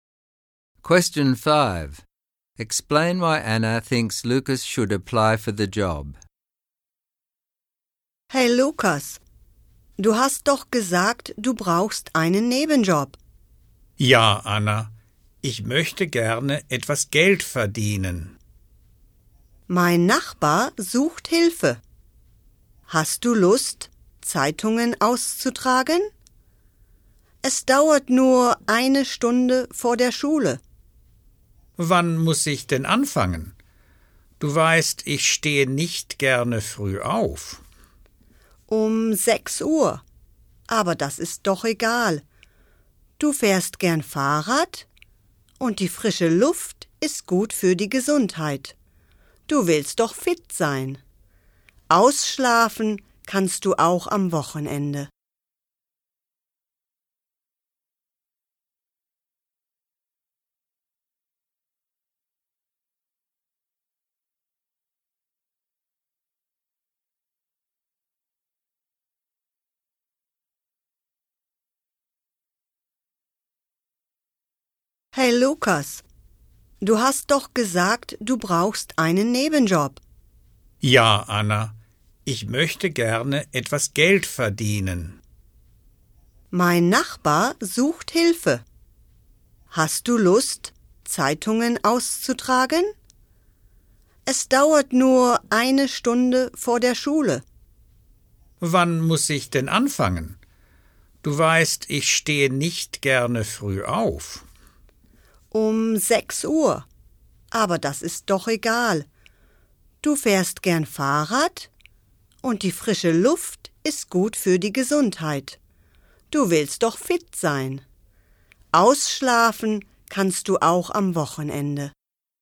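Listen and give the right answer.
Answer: He needs money, it only takes one hour before school, he likes cycling, the fresh air is healthy and keeps him fit, and he can sleep in on weekends.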